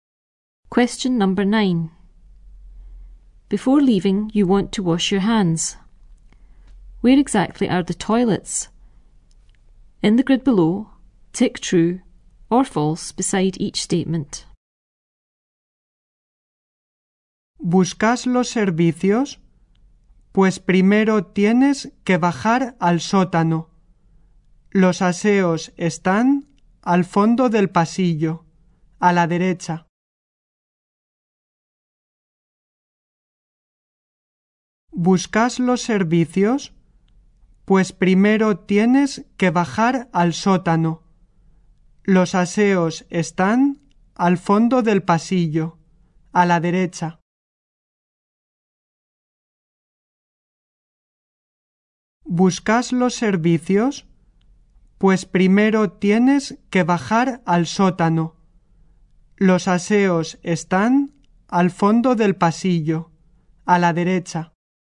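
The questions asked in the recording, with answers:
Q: Where exactly are the toilets?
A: In the basement, at the end of the corridor on the right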